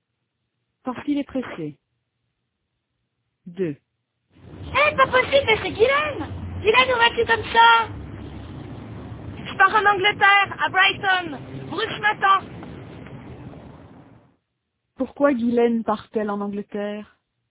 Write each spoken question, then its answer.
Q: Pourquoi Guylaine part-elle en Angleterre?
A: Parce que Bruce l'attend.